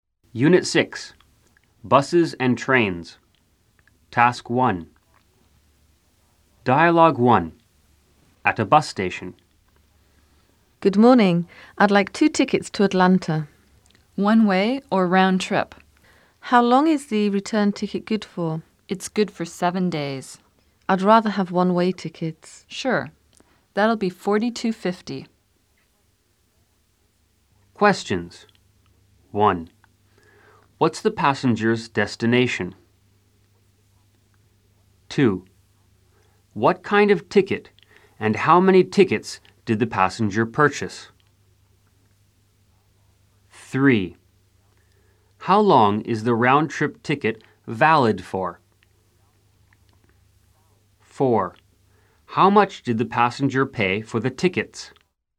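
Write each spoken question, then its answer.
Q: What's the passenger's destination?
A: Atlanta

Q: What kind of ticket and how many tickets did the passenger purchase?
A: Two one-way tickets

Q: How long is the round-trip ticket valid for?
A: 7 days

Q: How much did the passenger pay for the tickets?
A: $42.50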